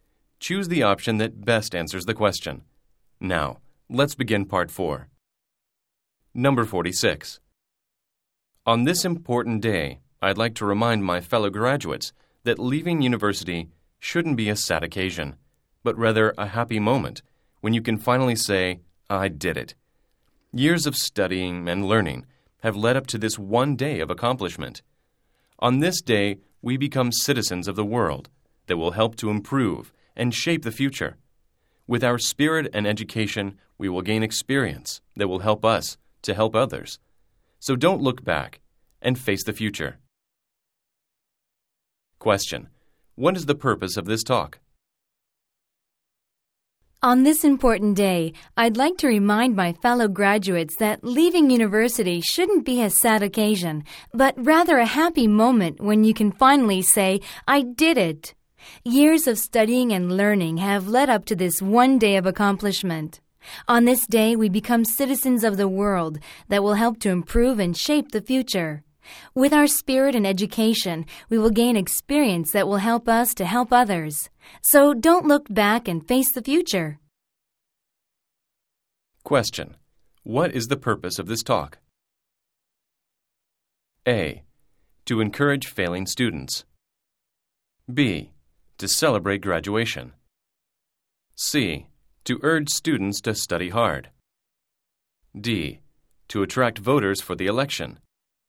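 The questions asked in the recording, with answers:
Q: What is the purpose of this talk?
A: B: To celebrate graduation.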